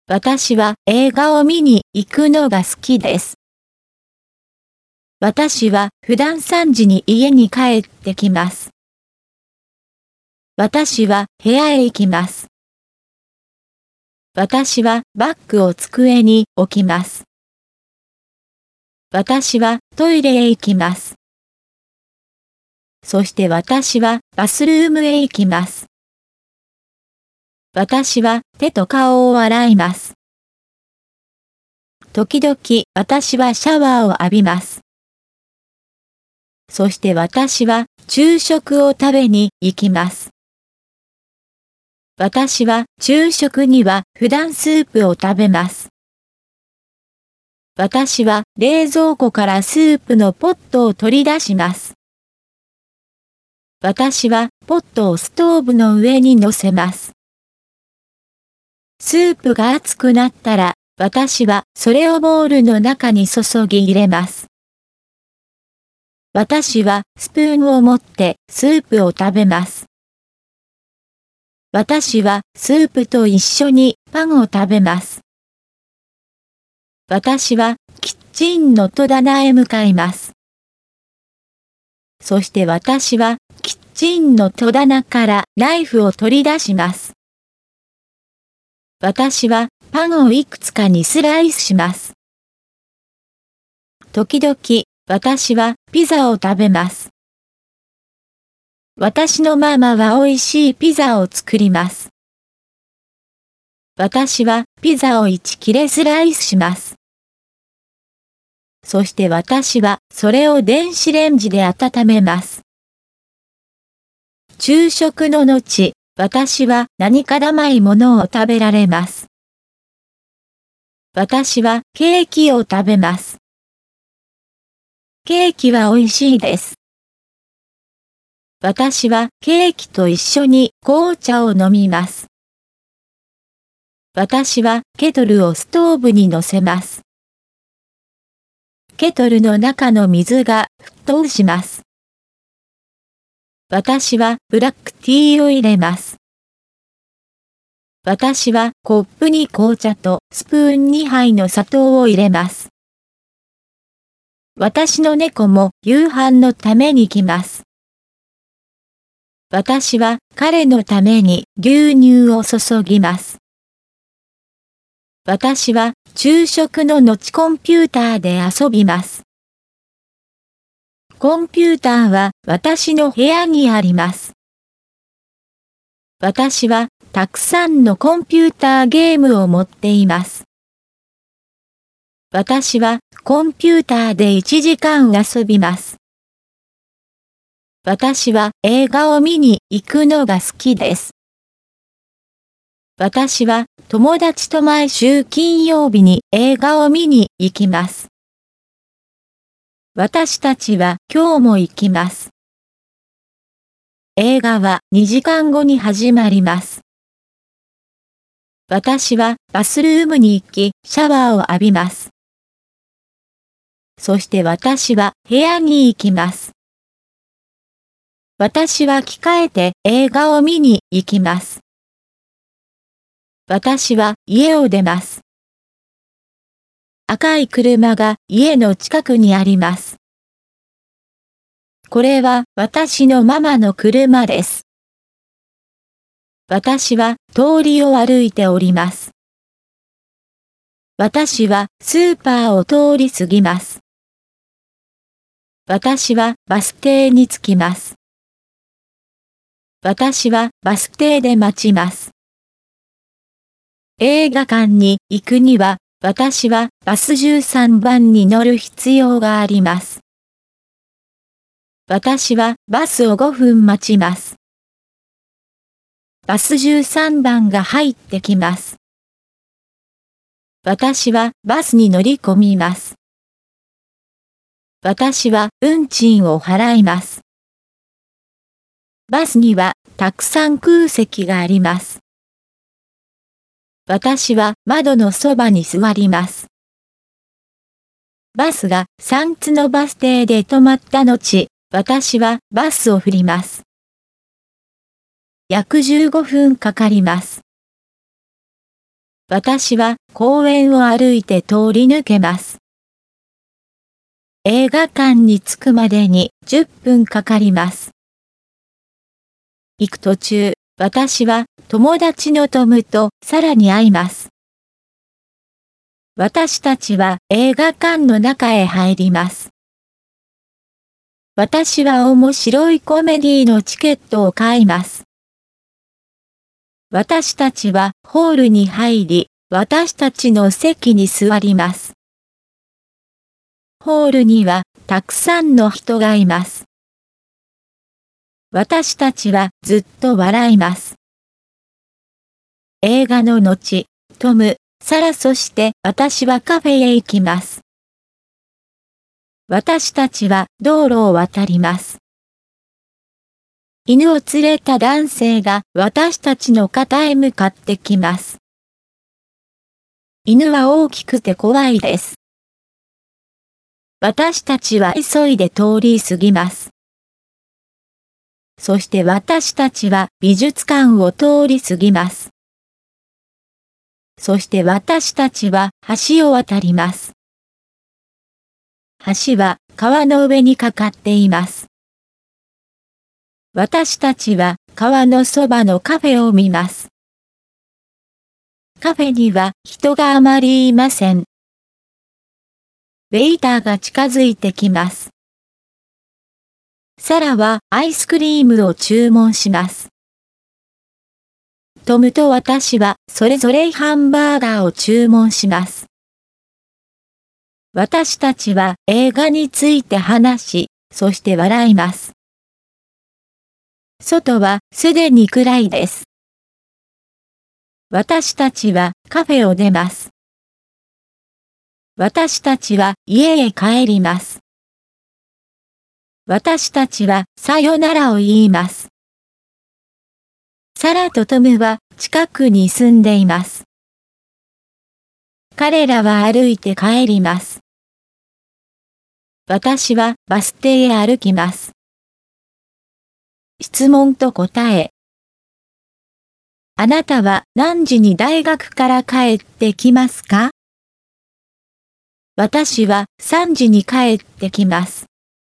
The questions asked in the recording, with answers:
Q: あなたは何時に大学から帰ってきますか?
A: 私は3時に帰ってきます。